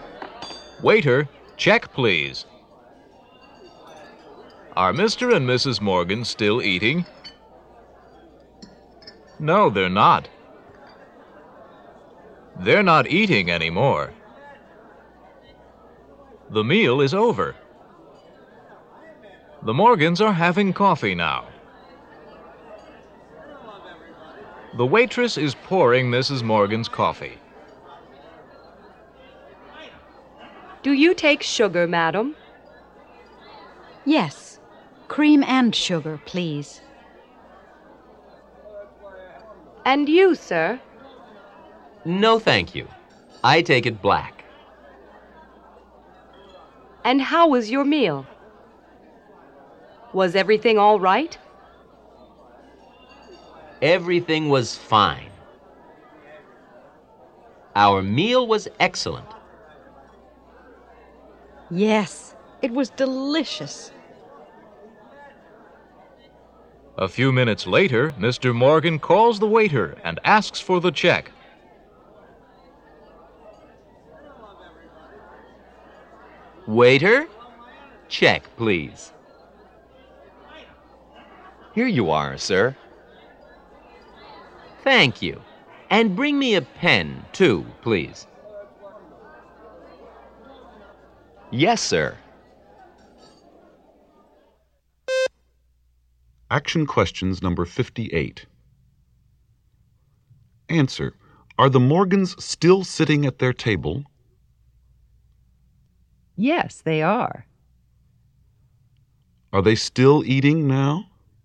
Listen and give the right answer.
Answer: No, they're not.